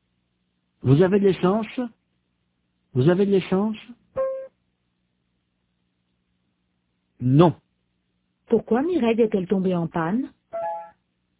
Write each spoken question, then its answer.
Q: Pourquoi Mireille est-elle tombée en panne ?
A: Parce qu'elle n'avait plus d'essence.